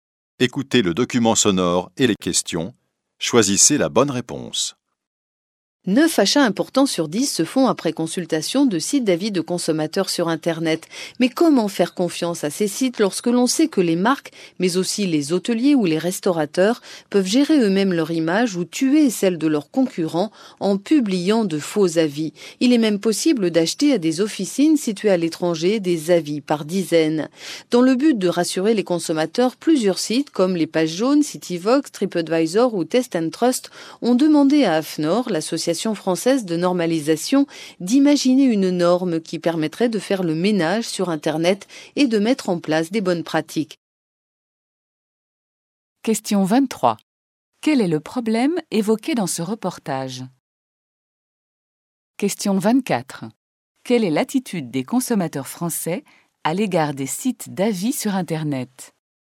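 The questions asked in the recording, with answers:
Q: Quel est le problème évoqué dans ce reportage?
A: Les faux avis publiés sur les sites d'avis de consommateurs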